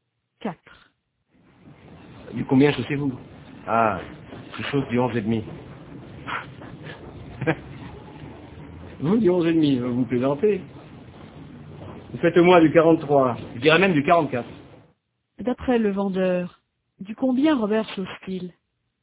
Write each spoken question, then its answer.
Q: D'après le vendeur, du combien Robert chausse-t-il ?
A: Du 43 au moins, peut-être même du 44.